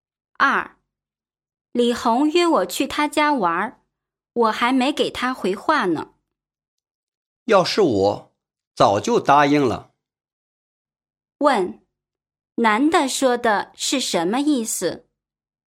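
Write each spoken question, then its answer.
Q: 问,男的说的是什么意思?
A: 应该早就答应李红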